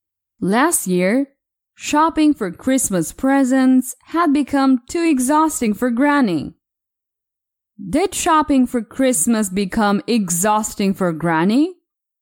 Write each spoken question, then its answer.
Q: Did shopping for Christmas become exhausting for Granny?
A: Yes, shopping for Christmas became exhausting for Granny last year.